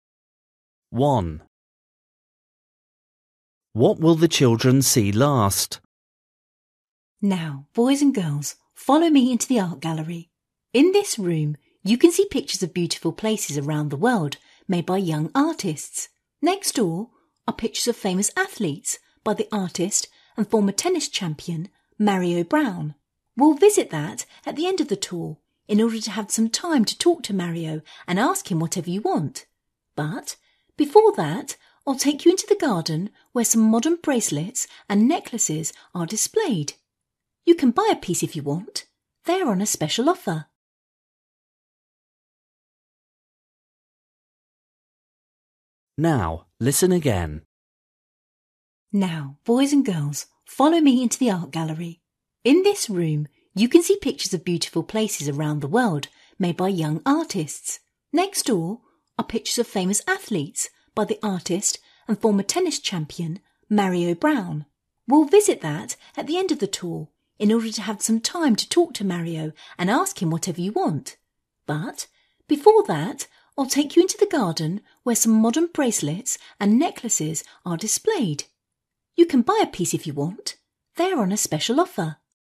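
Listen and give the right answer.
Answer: pictures of famous athletes by Mario Brown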